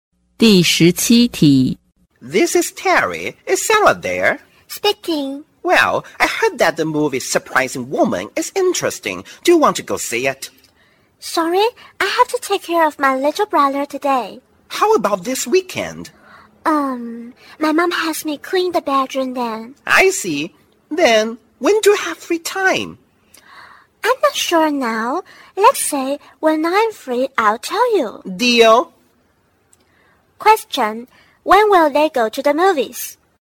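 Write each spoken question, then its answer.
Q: when will they go to the movies?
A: It's not decided yet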